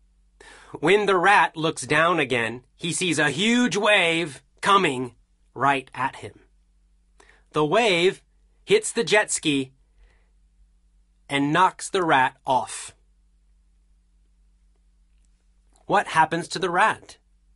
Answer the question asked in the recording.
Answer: The rat is knocked off the jet ski.